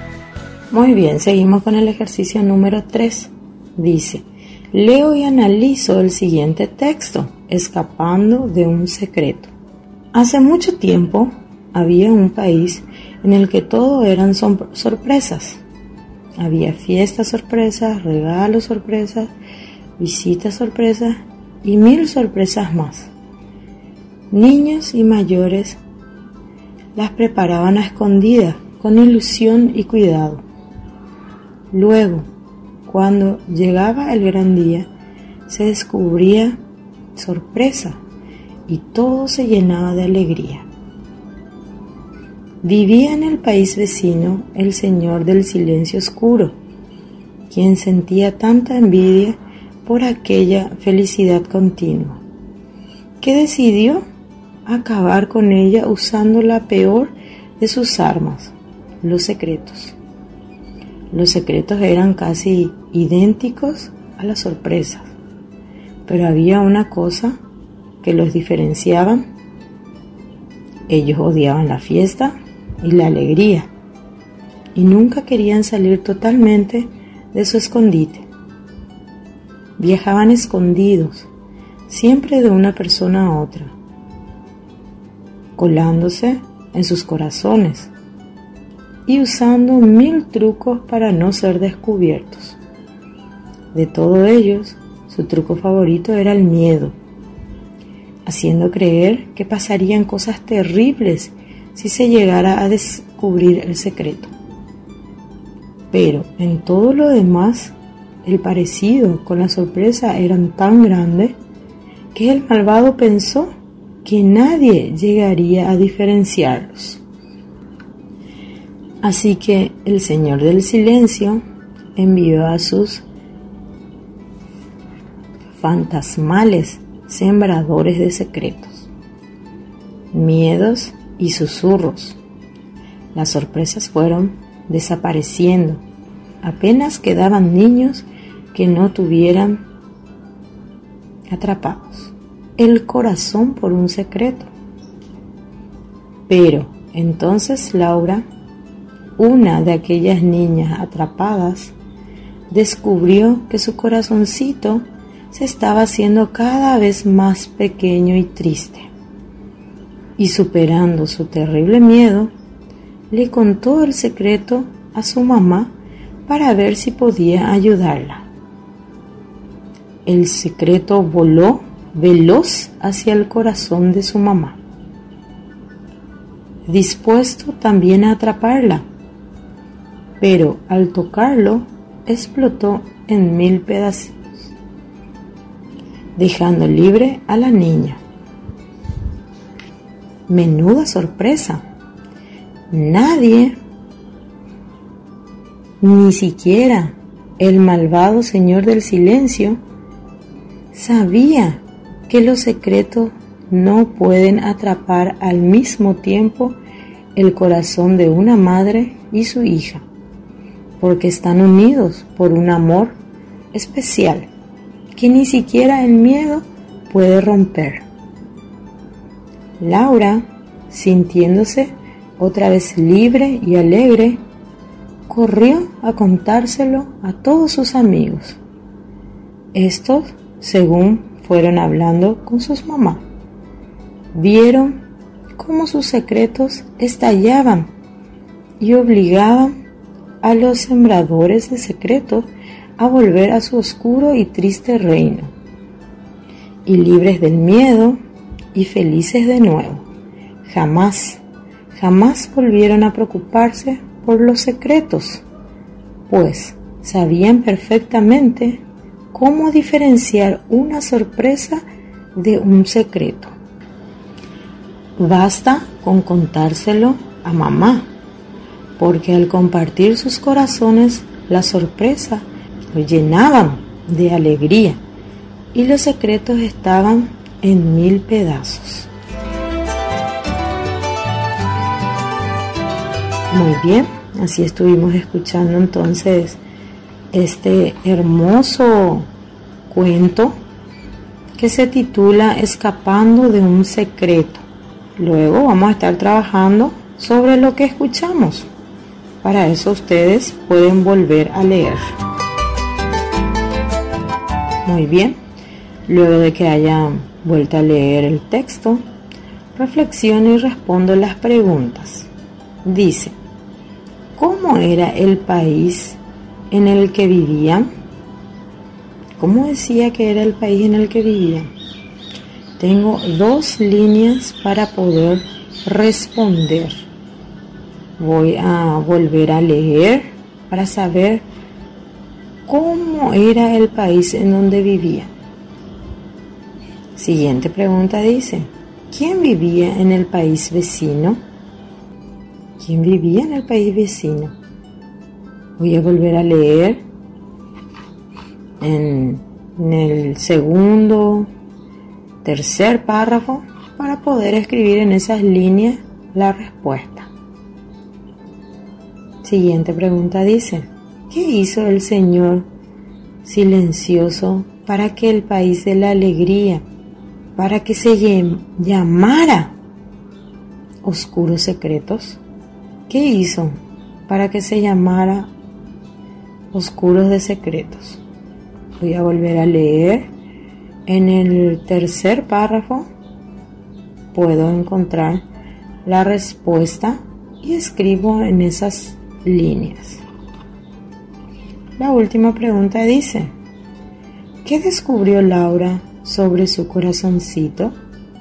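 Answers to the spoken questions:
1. Un país en el que todo eran sorpresas
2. El señor del silencio oscuro
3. Envió a sus sembradores de secretos, miedos y susurros
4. Que se estaba haciendo cada vez más pequeño y triste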